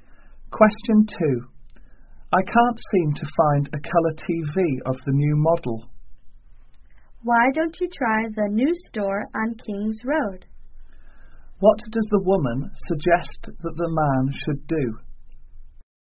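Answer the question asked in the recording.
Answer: Try the new store on King's Road.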